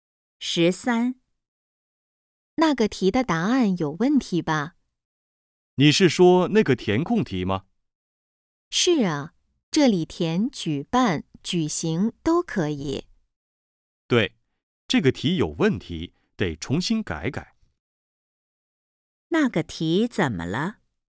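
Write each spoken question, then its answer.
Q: 那个题怎么了?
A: 答案有问题,得重新改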